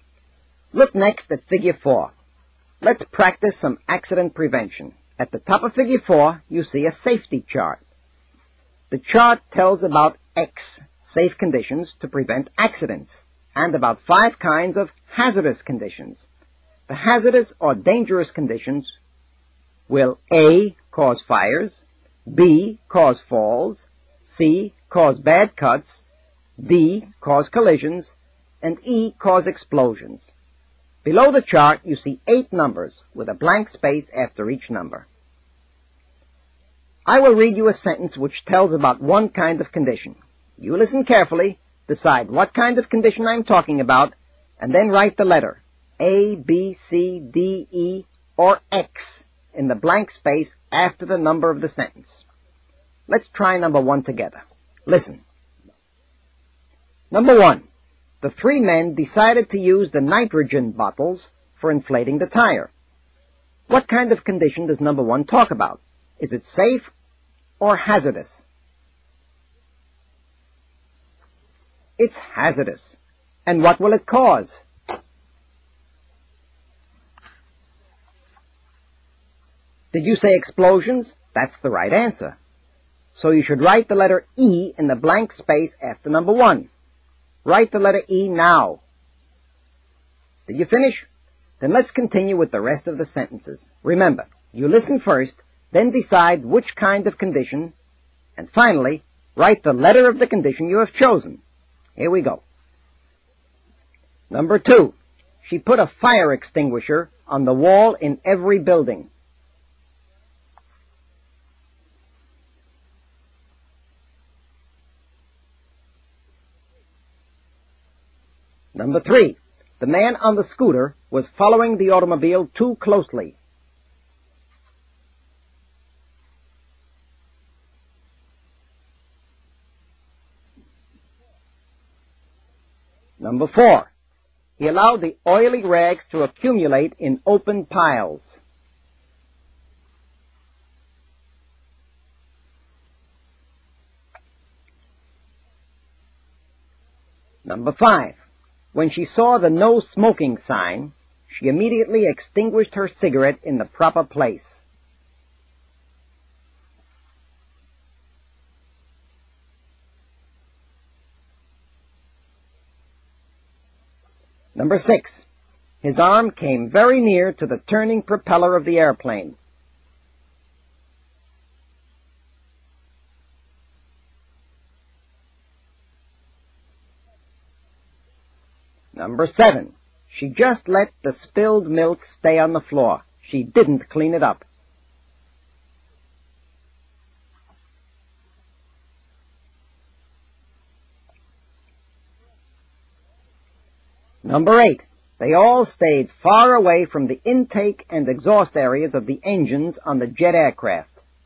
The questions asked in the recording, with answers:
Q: She put a fire extinguisher on the wall in every building.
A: The correct answer for number 2 is X, safe conditions.

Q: The man on the scooter was following the automobile too closely.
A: For number 3, the answer is D, cause collisions.

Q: He allowed the oily rags to accumulate in open piles.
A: In number 4, you should have written the letter A, cause fires.

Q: When she saw the no smoking sign, she immediately extinguished her cigarette in the proper place.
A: The correct answer for number 5 is the letter X, safe conditions.

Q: His arm came very near to the turning propeller of the airplane.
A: For number 6, the correct answer is C, cause bad cuts.

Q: She just let the spilled milk stay on the floor. She didn't clean it up.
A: In number 7, the answer is B, cause falls.

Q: They all stayed far away from the intake and exhaust areas of the engines on the jet aircraft.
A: And the correct answer for number 8, the last one, is X, safe conditions.